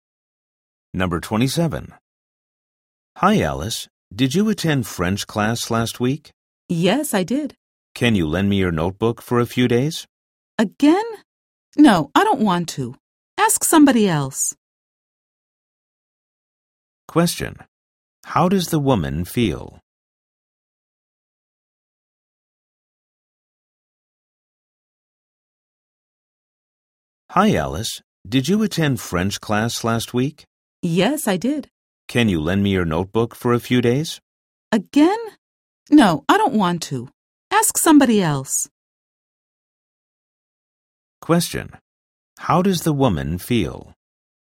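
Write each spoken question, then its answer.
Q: How does the woman feel?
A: Annoyed; she doesn't want to lend her notebook again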